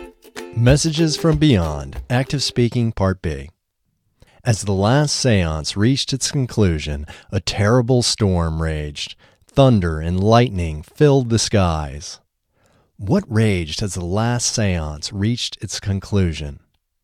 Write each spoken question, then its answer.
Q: What raged as the last seance reached its conclusion?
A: A terrible storm raged as the last seance reached its conclusion.